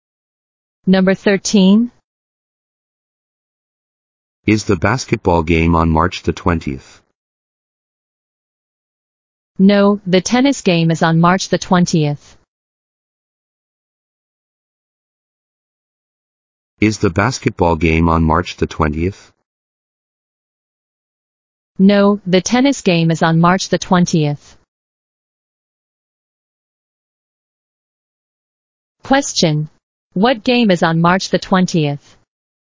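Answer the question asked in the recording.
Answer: The tennis game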